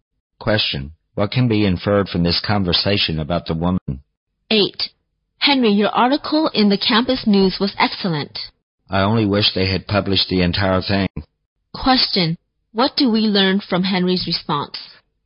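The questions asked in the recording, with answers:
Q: what do we learn from Henry's response?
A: Only part of his article was published.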